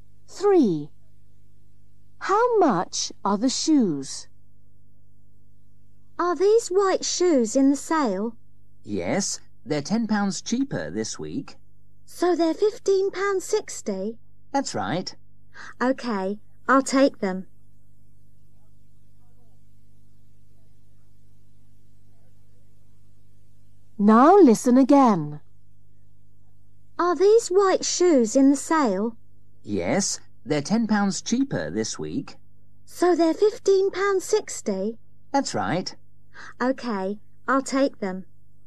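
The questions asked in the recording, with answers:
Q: How much are the shoes?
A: £15.60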